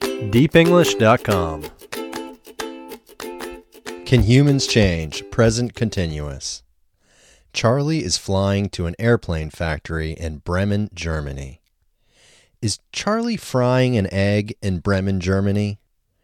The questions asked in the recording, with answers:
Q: Is Charlie frying an egg in Bremen, Germany?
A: No, Charlie isn't frying an egg in Bremen, Germany.